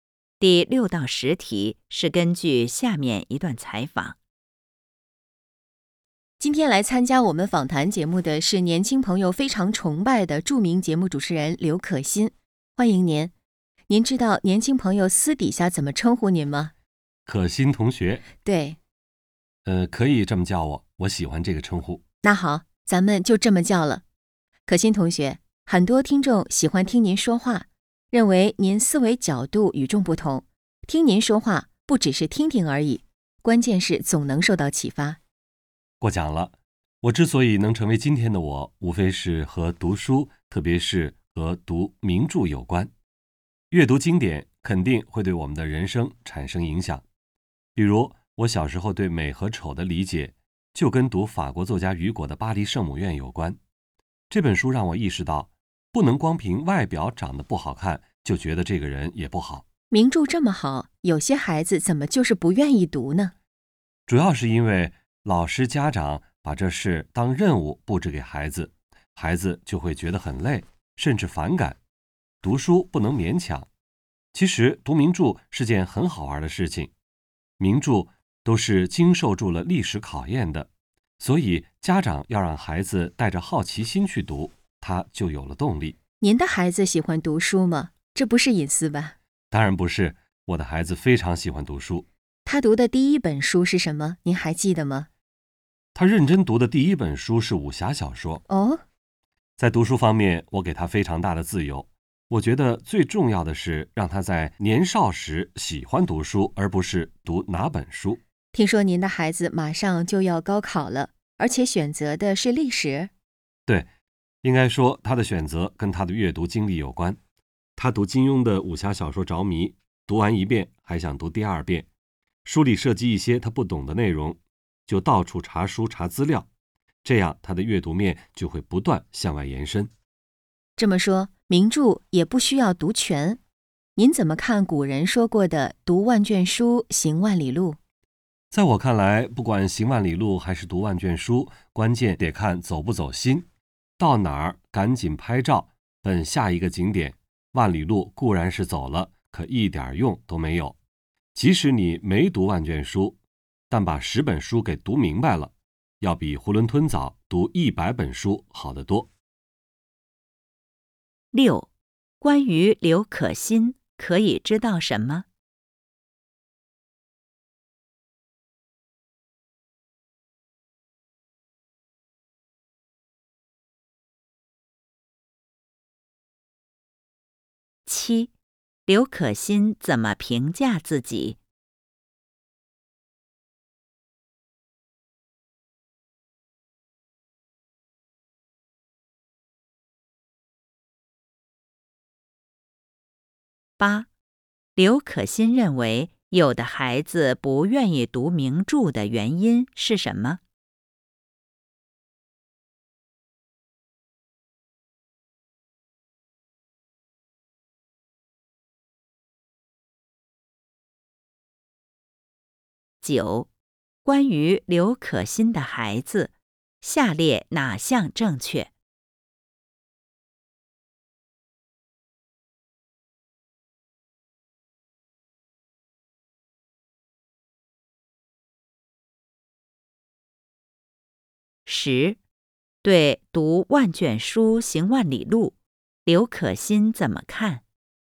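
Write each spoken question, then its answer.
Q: 刘可欣认为有的孩子不愿意读名著的原因是什么?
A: 老师和家长把读名著当任务布置给孩子,孩子觉得累,甚至反感

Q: 对读万卷书行万里路,刘可欣怎么看?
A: 关键看走不走心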